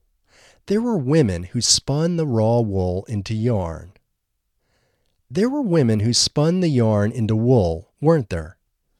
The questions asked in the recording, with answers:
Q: There were women who spun the yarn into wool, weren't there?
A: No, there weren't women who spun the yarn into wool.